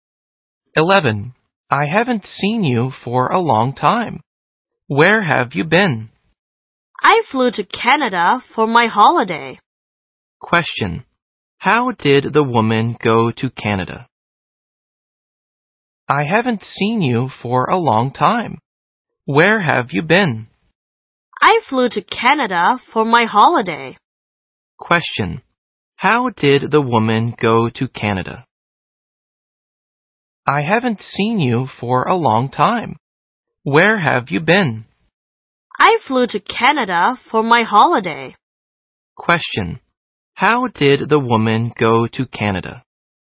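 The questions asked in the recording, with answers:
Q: How did the woman go to Canada?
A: By plane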